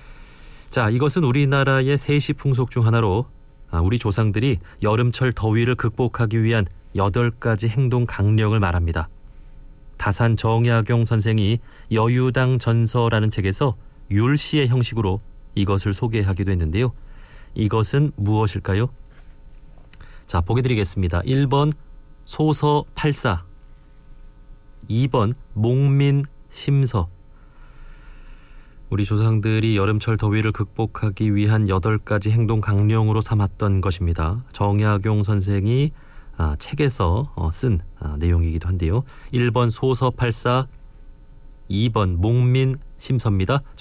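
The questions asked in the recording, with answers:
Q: 이것은 무엇일까요?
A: 1: 소서 팔사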